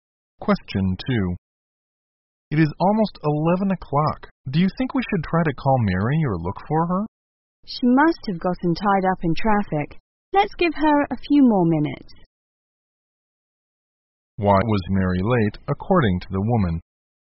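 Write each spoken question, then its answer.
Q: Why was Mary late, according to the woman?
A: She was probably stuck in traffic.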